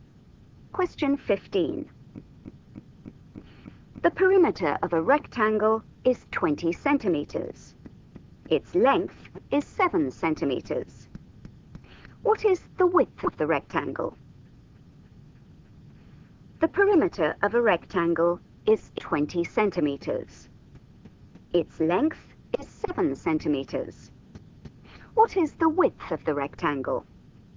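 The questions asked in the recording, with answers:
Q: What is the width of the rectangle?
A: 3 centimeters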